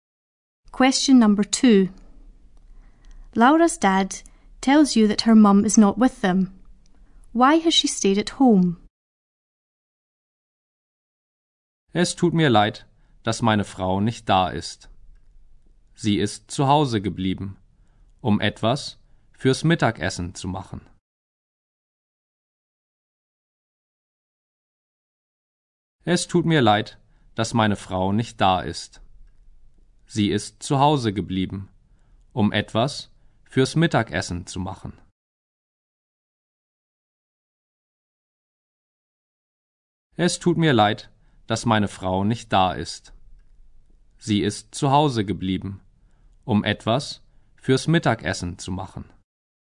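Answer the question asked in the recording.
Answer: To make something for lunch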